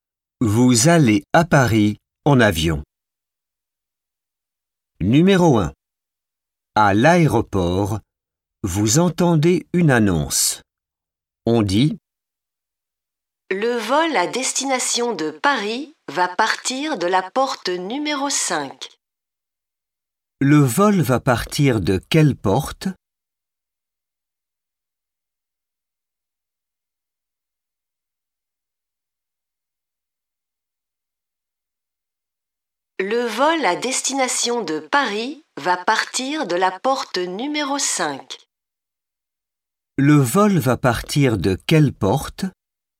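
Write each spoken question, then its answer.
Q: Le vol va partir de quelle porte ?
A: Porte numéro 5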